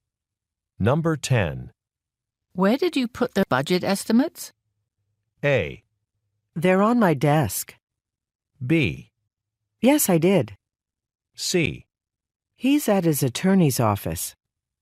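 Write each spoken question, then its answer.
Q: Where did you put the budget estimates?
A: A: They're on my desk.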